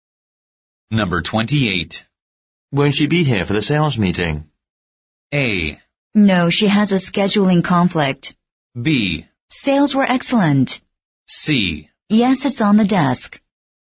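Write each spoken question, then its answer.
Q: Won't she be here for the sales meeting?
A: A: No, she has a scheduling conflict.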